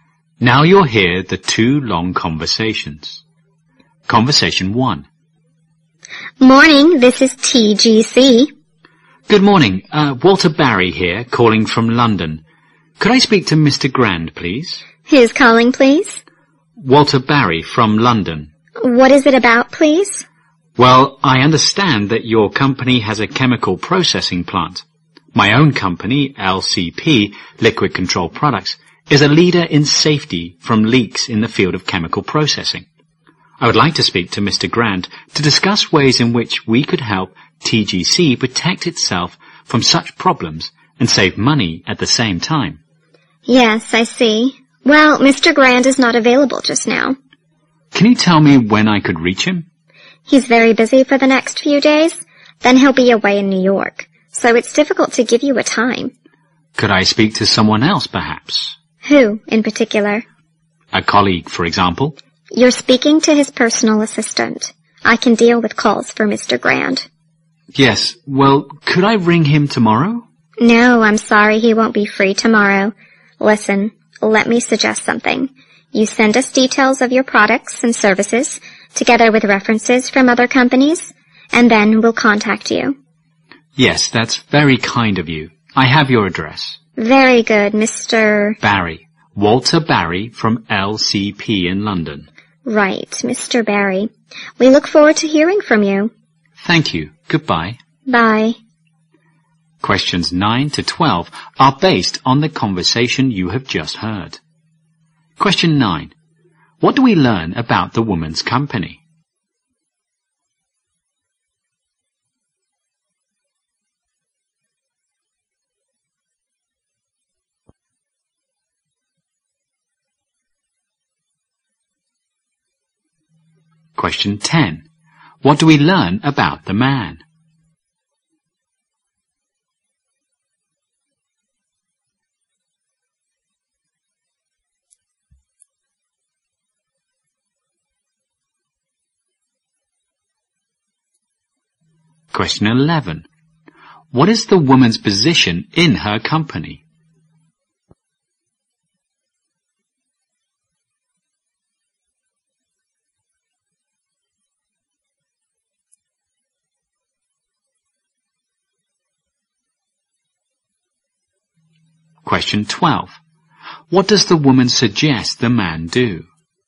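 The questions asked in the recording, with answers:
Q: What do we learn about the woman's company?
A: It has a chemical processing plant.

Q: What do we learn about the man?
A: He works for a company that prevents chemical leaks.

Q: What is the woman's position in her company?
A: Personal assistant to Mr. Grant.

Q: What does the woman suggest the man do?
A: Send details of his products and services with references.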